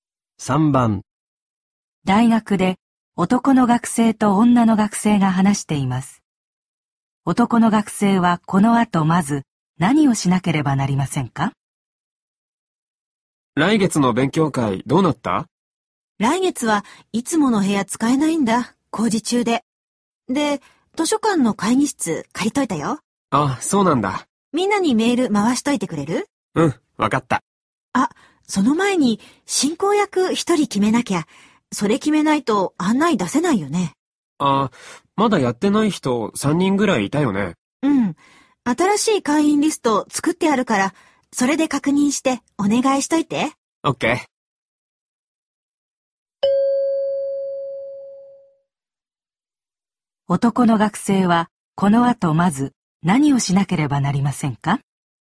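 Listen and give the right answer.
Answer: 会員リストで確認して進行役を頼む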